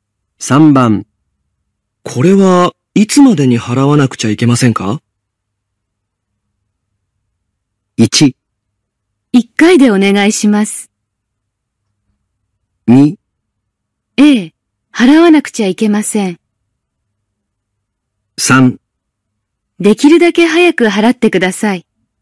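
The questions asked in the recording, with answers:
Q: これはいつまでに払わ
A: 3: できるだけ早く払ってください。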